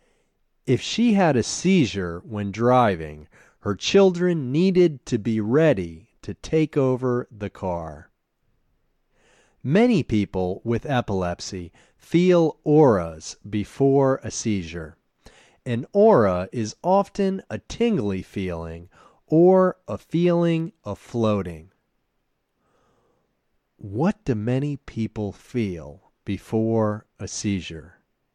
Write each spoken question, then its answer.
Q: What do many people feel before a seizure?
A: Many people with epilepsy feel auras before a seizure.